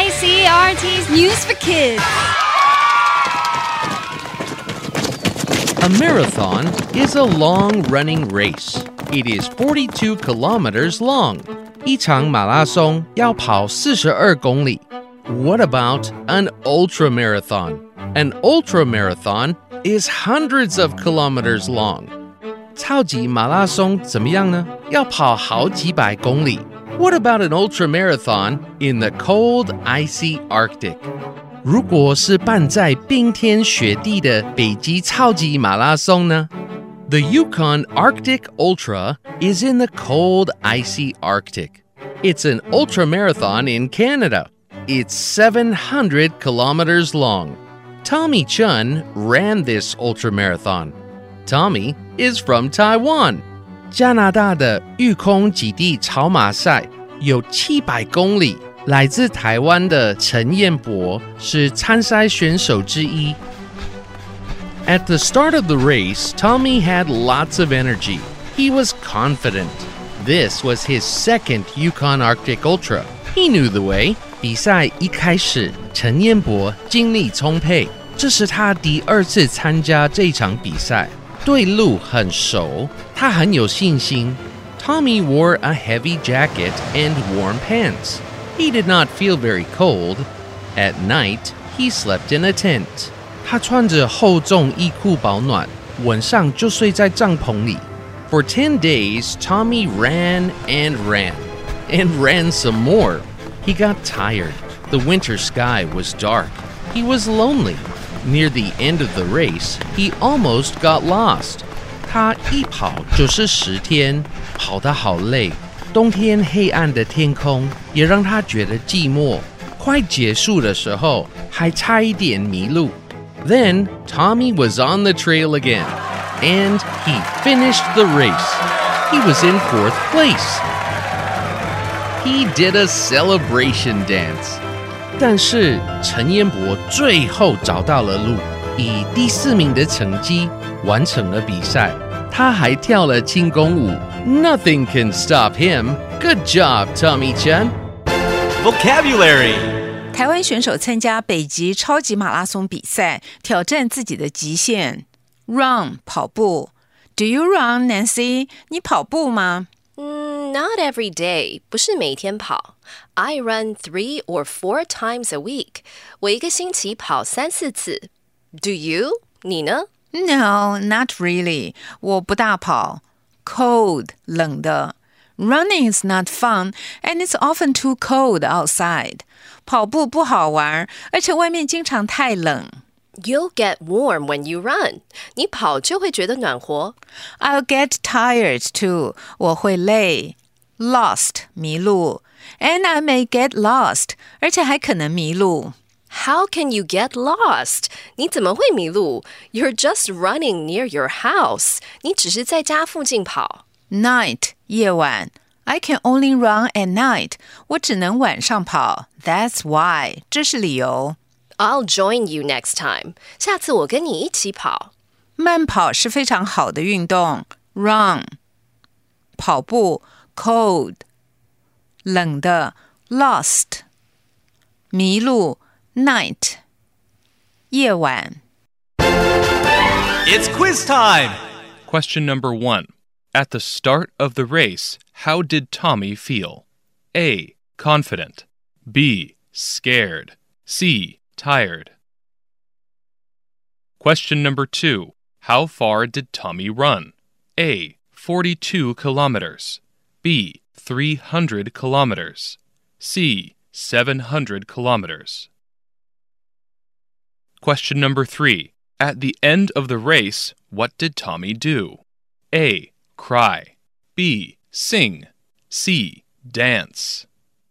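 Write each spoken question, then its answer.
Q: At the start of the race, how did Tommy feel?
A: A: Confident

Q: How far did Tommy run?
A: C: 700 kilometers

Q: At the end of the race, what did Tommy do?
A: C: Dance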